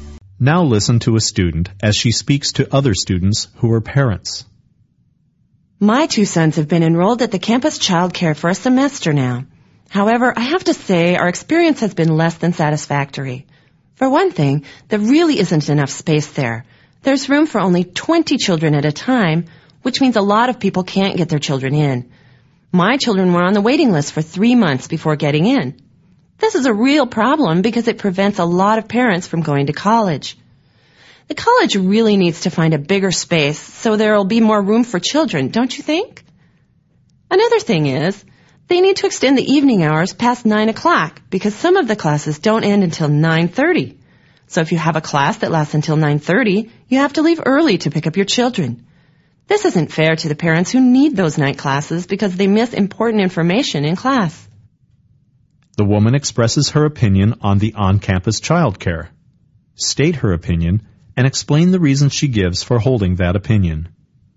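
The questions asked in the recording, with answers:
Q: The woman expresses her opinion on the on-campus childcare. State her opinion and explain the reasons she gives for holding that opinion.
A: She is dissatisfied: there isn't enough space (room for only 20 children, long waiting lists, which keeps parents from college), and the evening hours should go past 9 o'clock because some classes end at 9:30, so parents have to leave early and miss information.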